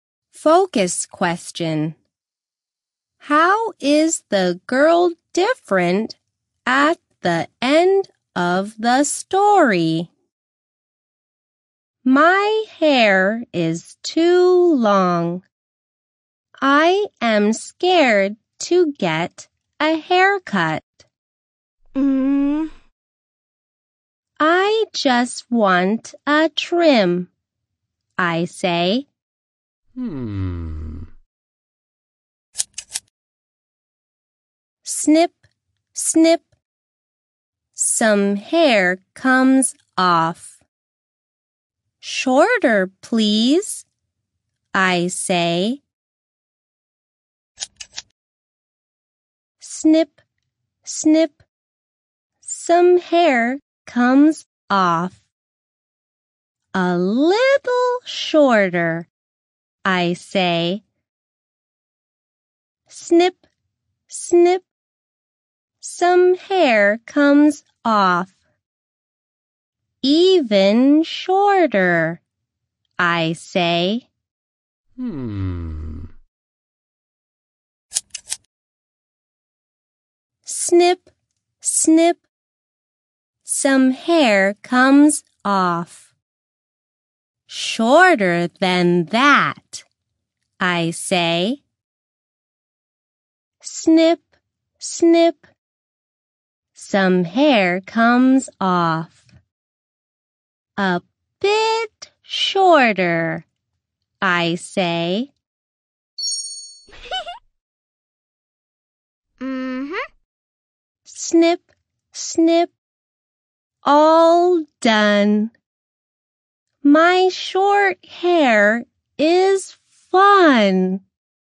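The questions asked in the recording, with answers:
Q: How is the girl different at the end of the story?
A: Her hair is short now, and instead of being scared of a haircut she thinks her short hair is fun.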